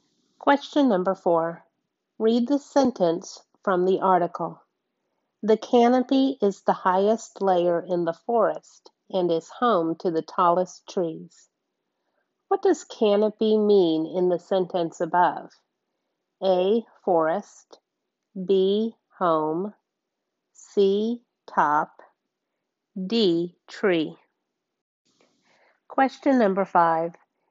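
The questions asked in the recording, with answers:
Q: What does canopy mean in the sentence above?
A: C: Top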